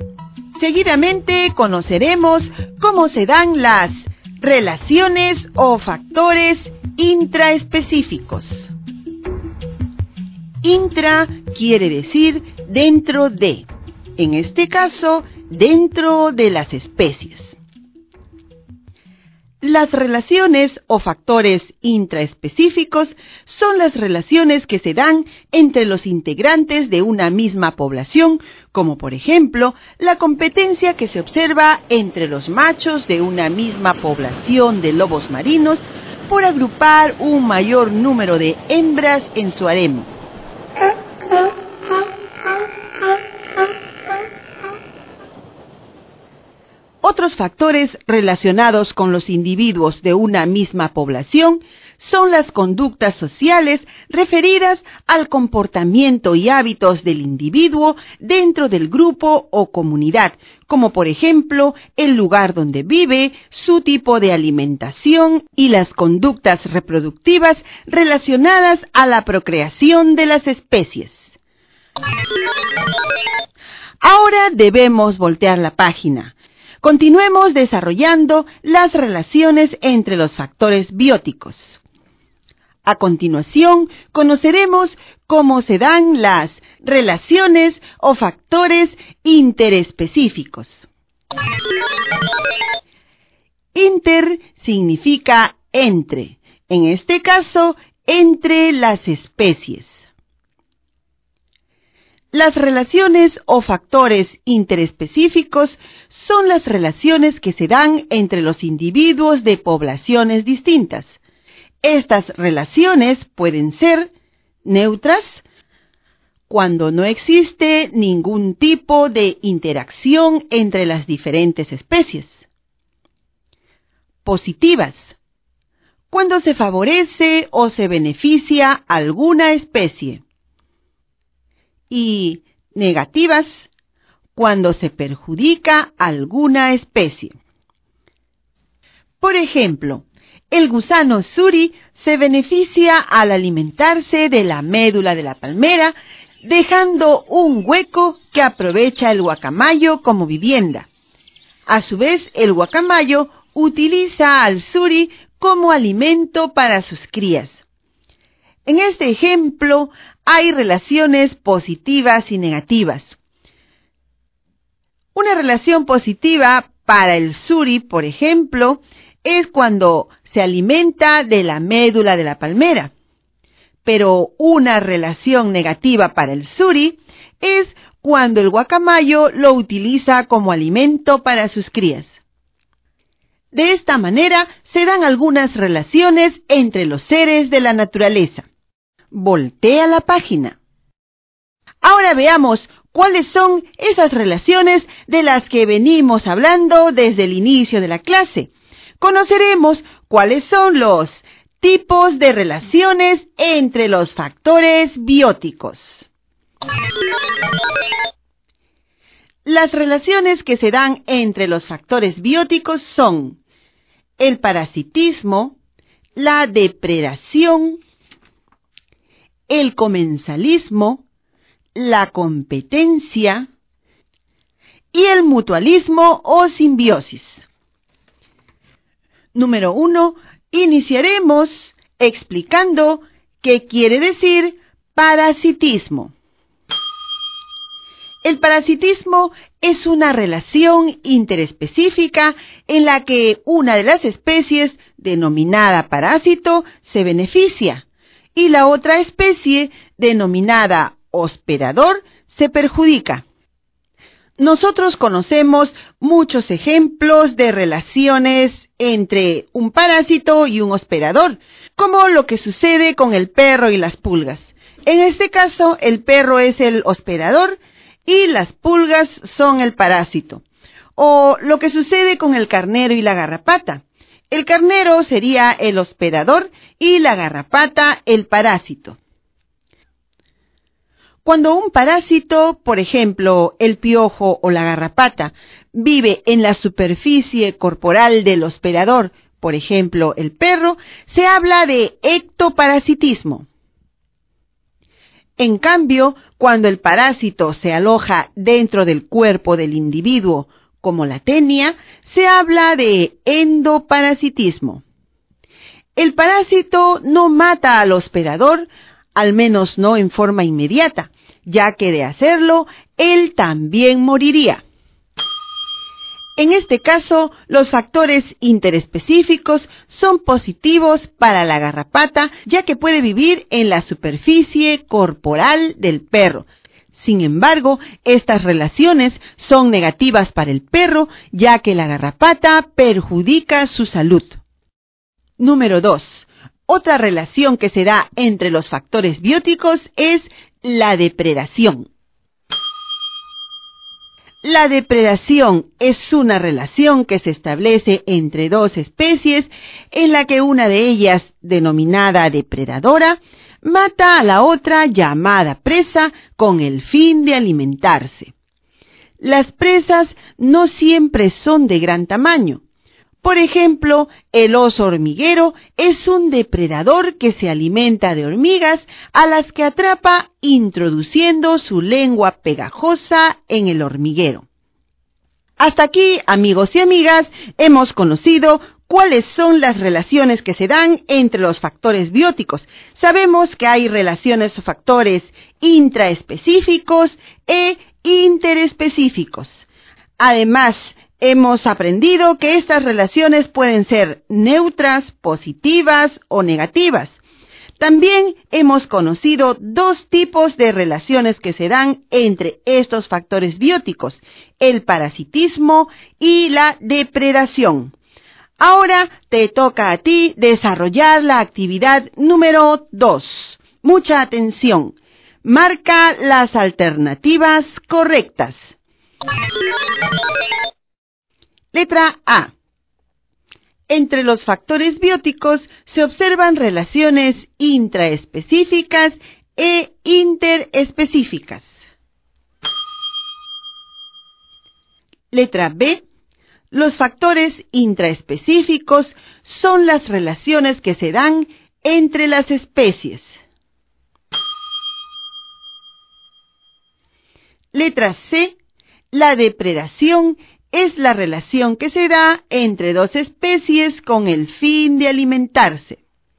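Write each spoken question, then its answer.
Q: Letra A. Entre los factores bióticos se observan relaciones intraespecíficas e interespecíficas.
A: Correcta

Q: Letra B. Los factores intraespecíficos son las relaciones que se dan entre las especies.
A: Incorrecta

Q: Letra C. La depredación es la relación que se da entre dos especies con el fin de alimentarse.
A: Correcta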